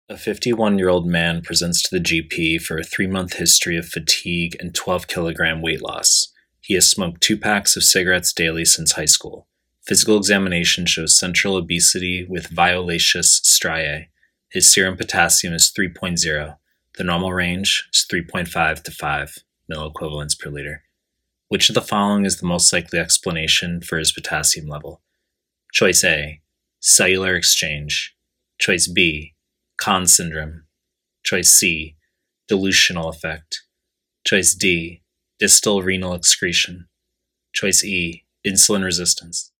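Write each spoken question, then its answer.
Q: Which of the following is the most likely explanation for his potassium level?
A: D: distal renal excretion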